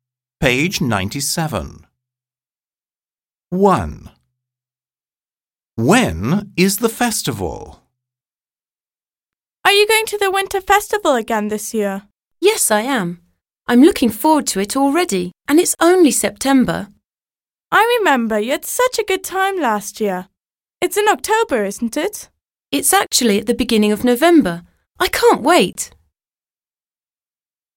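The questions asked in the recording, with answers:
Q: When is the festival?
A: At the beginning of November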